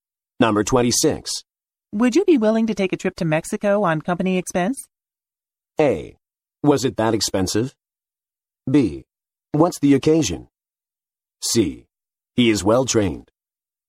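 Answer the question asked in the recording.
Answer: B: What's the occasion?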